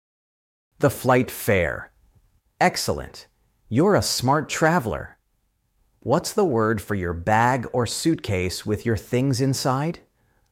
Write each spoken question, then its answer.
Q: What's the word for your bag or suitcase with your things inside?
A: Luggage.